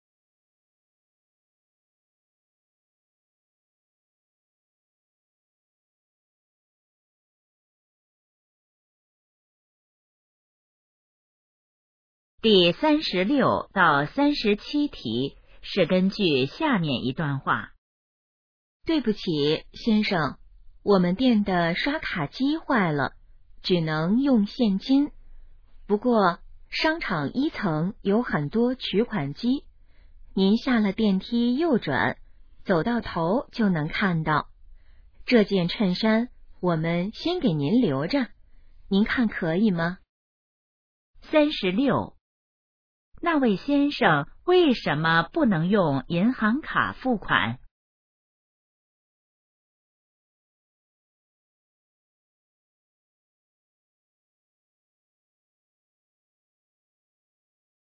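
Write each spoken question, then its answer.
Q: 那位先生为什么不能用银行卡付款?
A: 刷卡机坏了

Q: 哪里有取款机?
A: 商场1层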